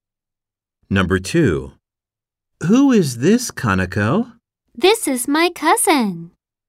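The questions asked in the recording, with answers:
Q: Who is this, Kaneko?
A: my cousin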